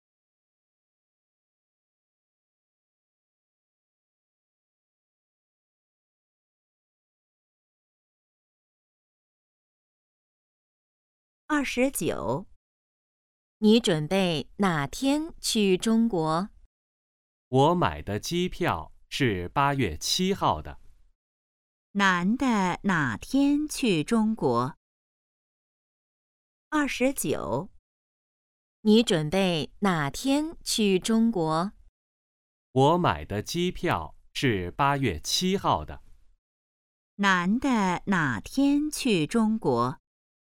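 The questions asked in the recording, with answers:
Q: 男的哪天去中国?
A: 8月7号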